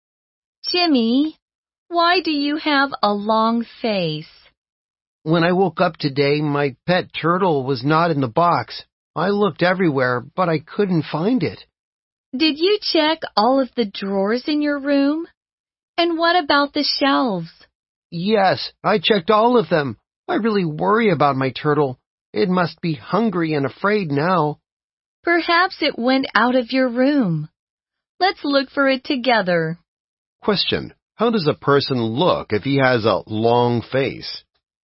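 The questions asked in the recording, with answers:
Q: how does a person look if he has a long face?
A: Sad and worried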